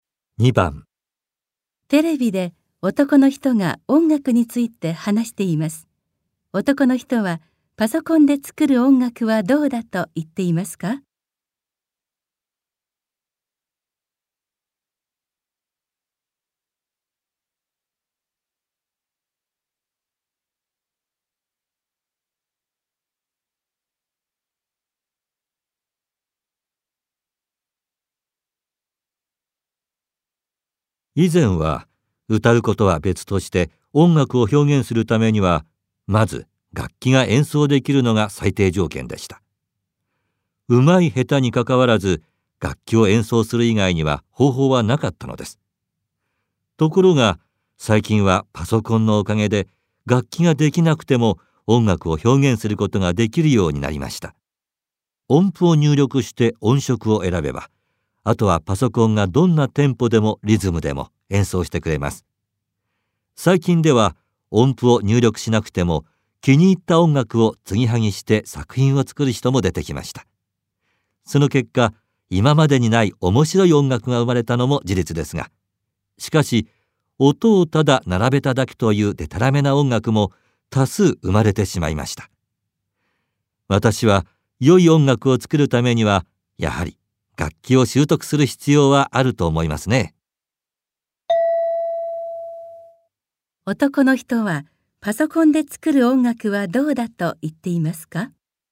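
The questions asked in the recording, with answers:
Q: 男の人はパソコンで作る音楽はどうだと言っていますか?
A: 今までにない面白い音楽も生まれたが、音をただ並べただけのデタラメな音楽も多い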